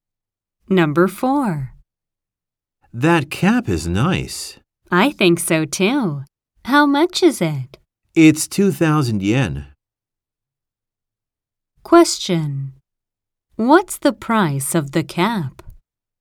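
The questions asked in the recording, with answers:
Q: What's the price of the cap?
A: 2,000 yen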